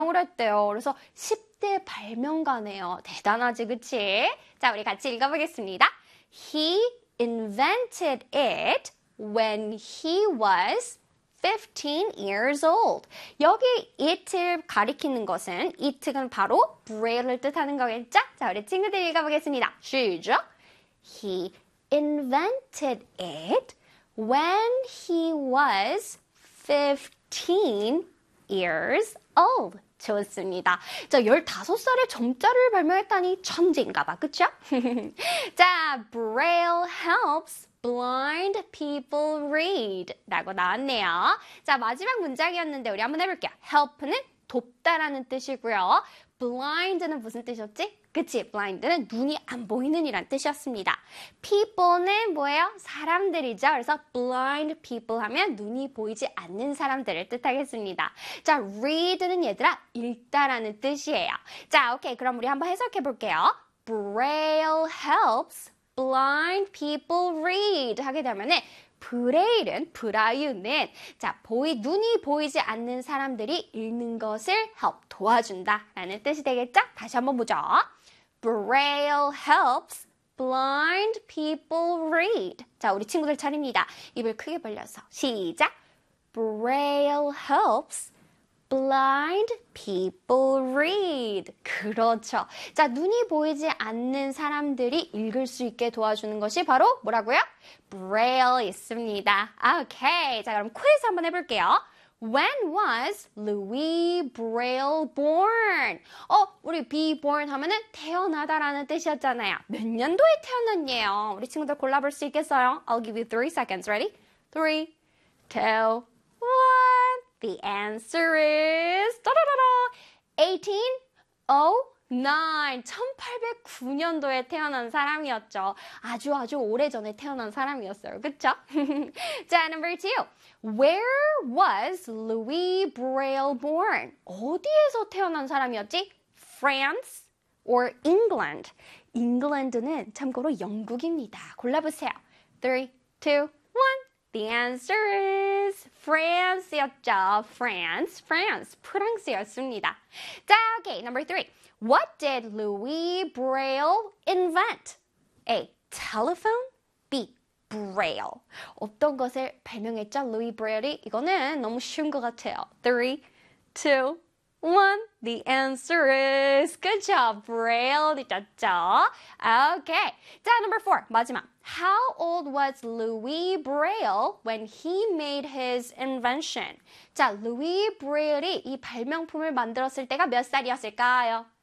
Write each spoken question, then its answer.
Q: Where was Louis Braille born?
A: The answer is France였죠.

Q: What did Louis Braille invent?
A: Braille이었죠.

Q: How old was Louis Braille when he made his invention?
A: 15 years old.